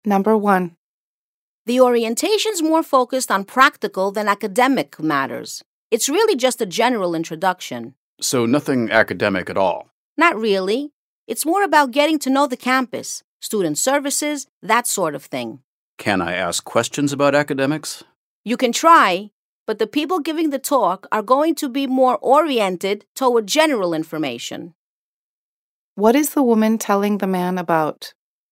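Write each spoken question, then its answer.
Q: What is the woman telling the man about?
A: The orientation, which covers practical matters such as the campus and student services rather than academics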